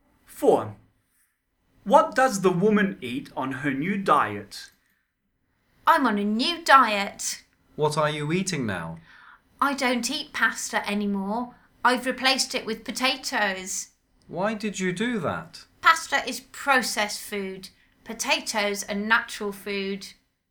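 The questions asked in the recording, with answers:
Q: What does the woman eat on her new diet?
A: Potatoes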